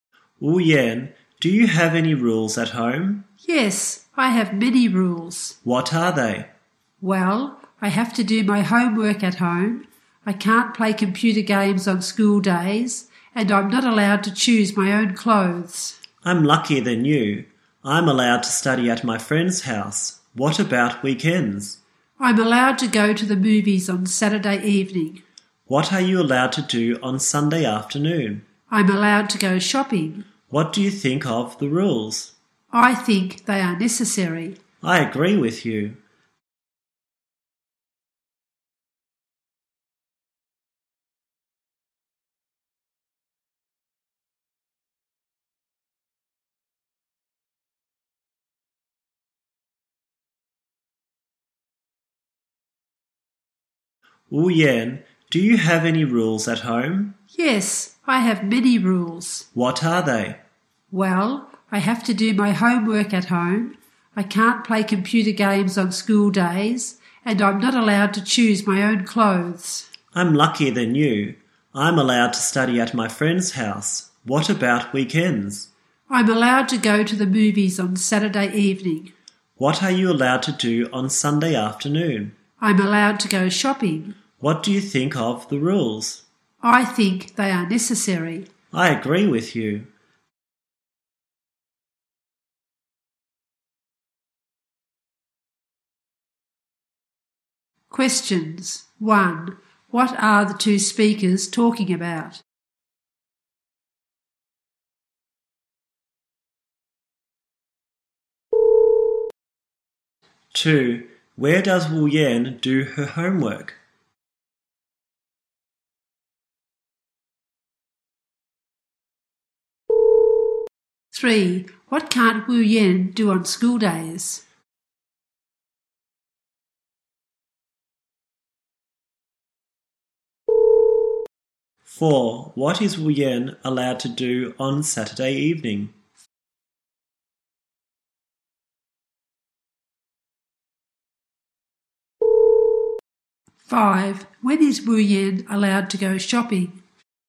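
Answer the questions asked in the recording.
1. Rules at home
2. At home
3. Play computer games
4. Go to the movies
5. On Sunday afternoon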